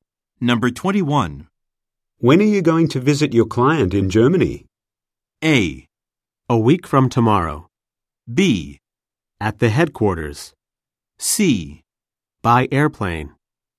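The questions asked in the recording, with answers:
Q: When are you going to visit your client in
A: A: A week from tomorrow.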